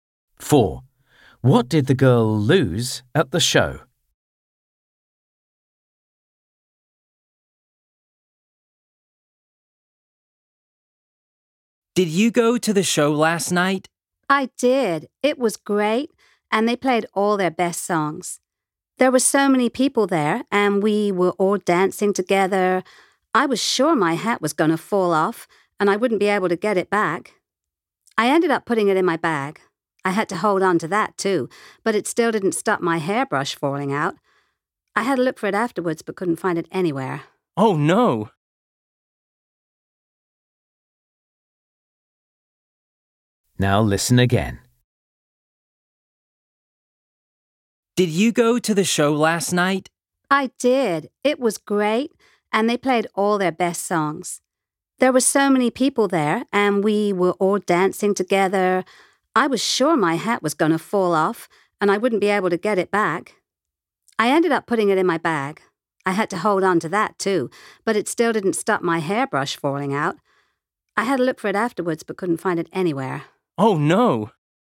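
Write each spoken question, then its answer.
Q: What did the girl lose at the show?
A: her hairbrush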